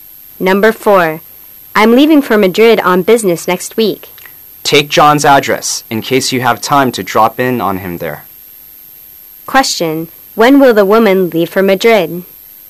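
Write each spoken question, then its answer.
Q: when will the woman leave for Madrid?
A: Next week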